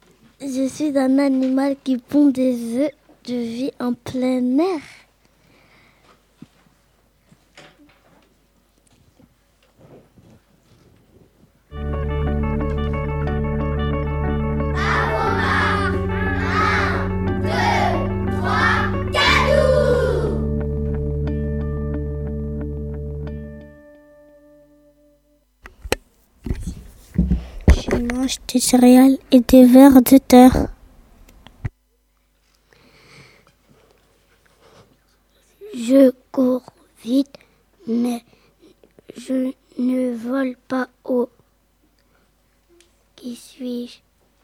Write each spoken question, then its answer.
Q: Qui suis-je?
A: La poule.